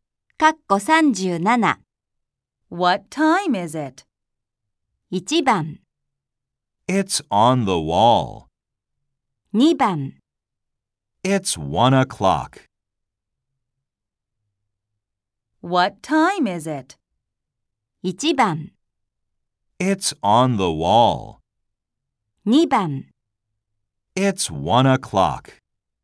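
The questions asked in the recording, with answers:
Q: What time is it?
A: 2: It's 1 o'clock.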